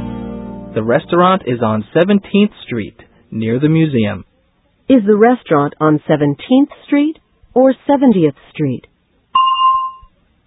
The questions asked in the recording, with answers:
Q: Is the restaurant on 17th Street or 70th Street?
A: It's on 17th Street. 17.